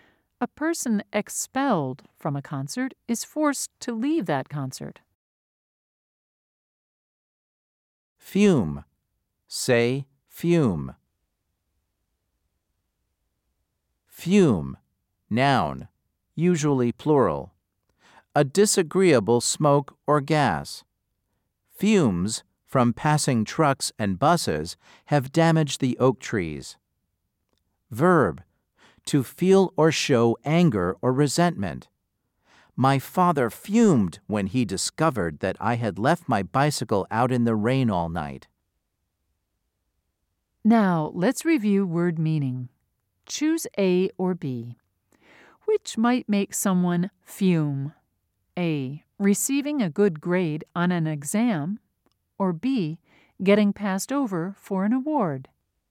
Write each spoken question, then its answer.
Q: Choose A or B. Which might make someone fume?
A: If you said B, you were correct.